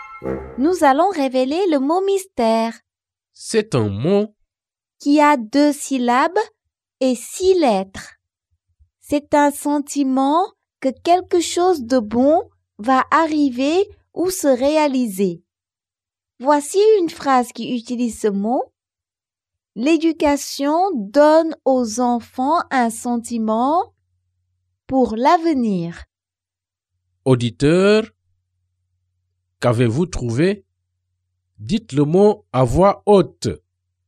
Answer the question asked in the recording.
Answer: Le mot mystère est espoir.